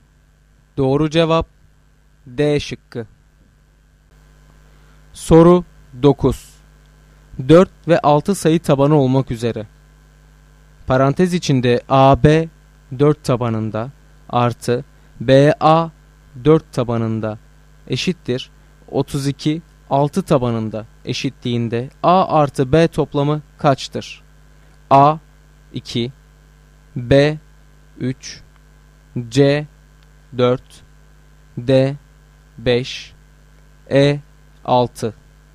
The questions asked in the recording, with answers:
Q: Parantez içinde AB 4 tabanında artı BA 4 tabanında eşittir 32 6 tabanında eşitliğinde A artı B toplamı kaçtır?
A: Doğru cevap C şıkkı.